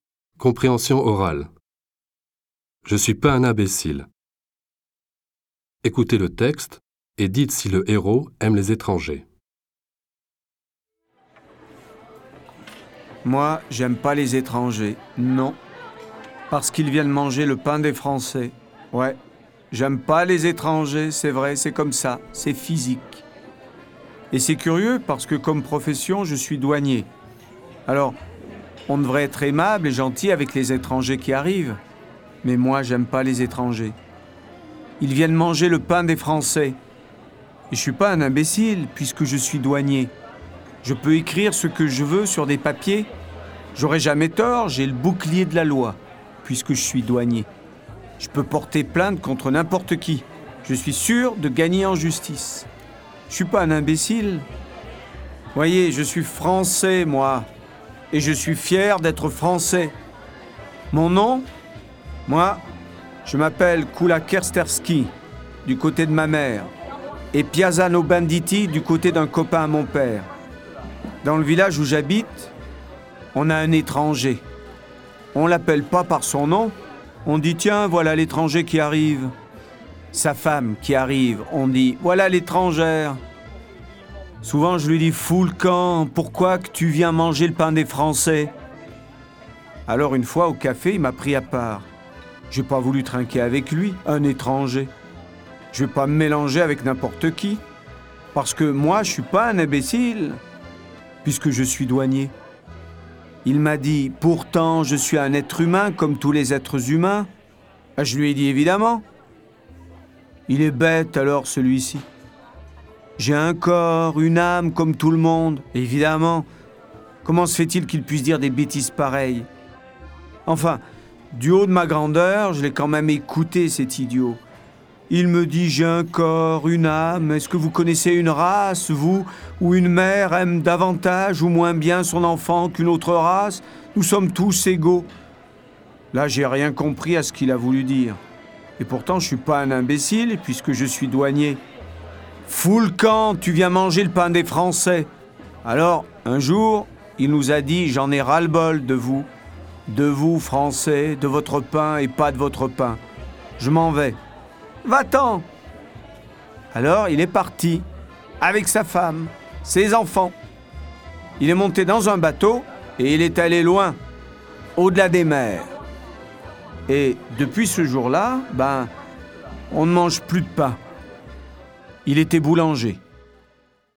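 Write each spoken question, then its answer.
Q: Écoutez le texte et dites si le héros aime les étrangers.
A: Non, il n'aime pas les étrangers.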